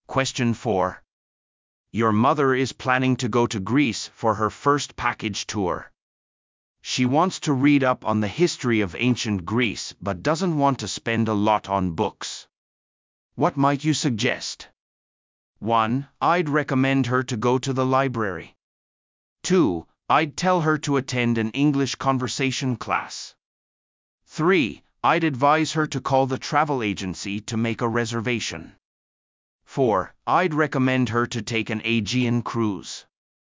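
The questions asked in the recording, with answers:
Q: What might you suggest?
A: 1: I'd recommend her to go to the library.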